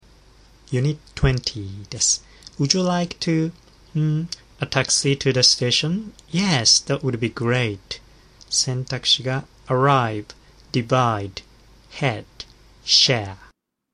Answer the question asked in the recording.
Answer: 正解は D の share です。